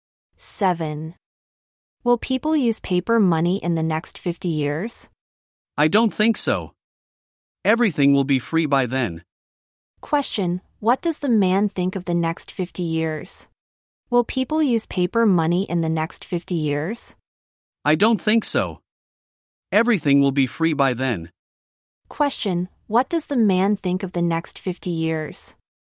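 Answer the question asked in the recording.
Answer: Everything will be free; people won't use paper money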